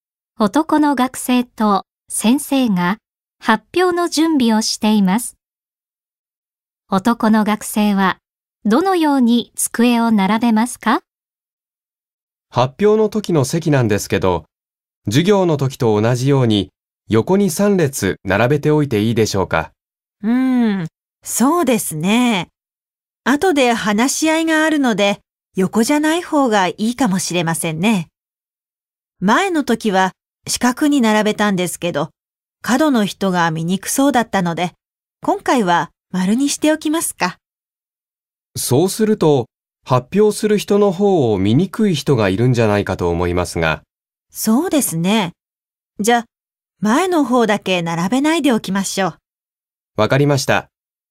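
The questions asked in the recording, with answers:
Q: 男の学生はどのように机を並べますか?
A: 丸く並べるが、前の方だけは並べずに空けておく(U字型)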